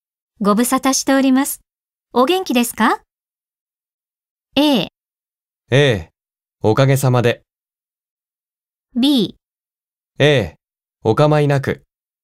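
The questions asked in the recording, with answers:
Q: ご無沙汰しております。お元気ですか?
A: A: おかげさまで。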